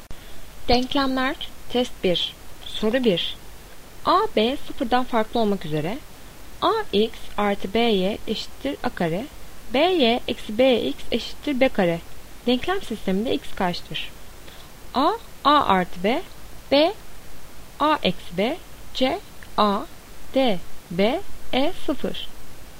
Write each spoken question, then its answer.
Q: Denklem sisteminde X kaçtır?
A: Doğru cevap B, A eksi B.